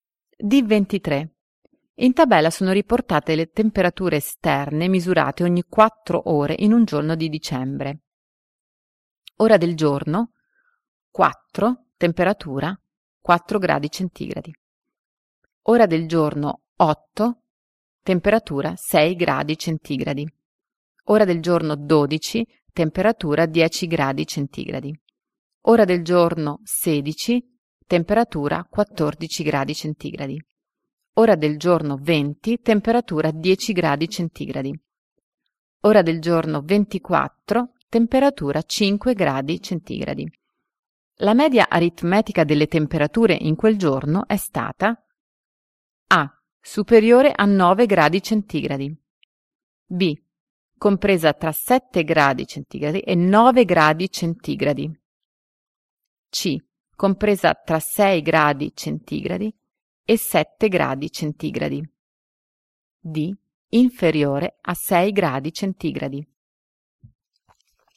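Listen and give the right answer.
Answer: B: Compresa tra 7 gradi centigradi e 9 gradi centigradi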